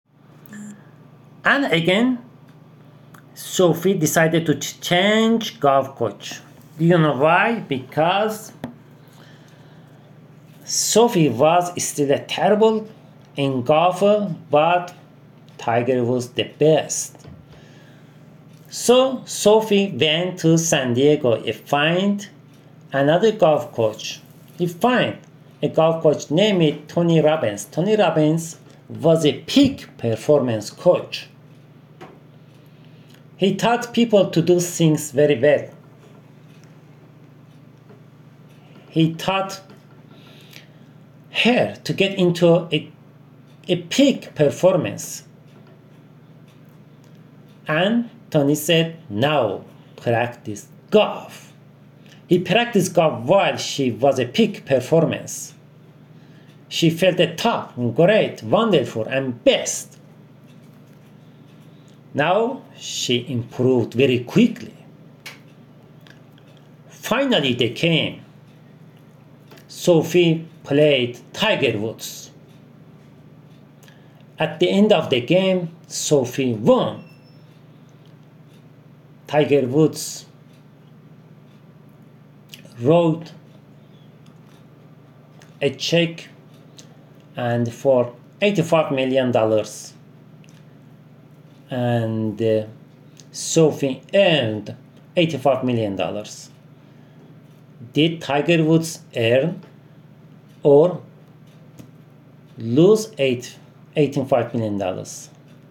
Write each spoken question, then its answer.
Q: Did Tiger Woods earn or lose $85 million?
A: Tiger Woods lost $85 million.